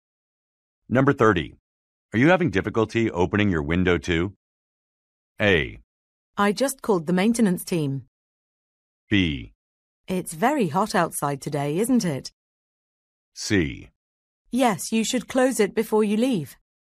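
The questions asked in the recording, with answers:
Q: Are you having difficulty opening your window too?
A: A: I just called the maintenance team.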